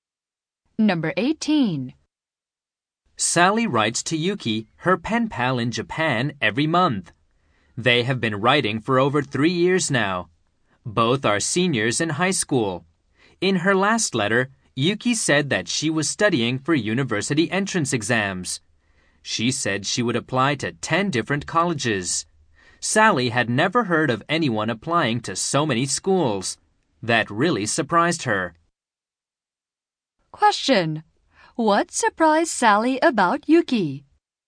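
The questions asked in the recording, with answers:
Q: What surprised Sally about Yuki?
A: She would apply to 10 different colleges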